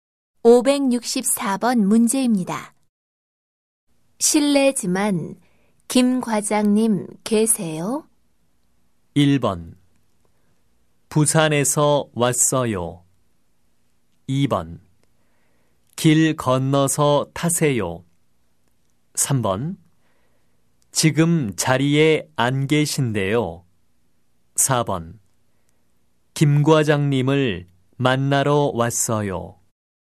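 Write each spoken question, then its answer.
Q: 실례지만 김 과장님 계세요?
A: 3: 지금 자리에 안 계신데요.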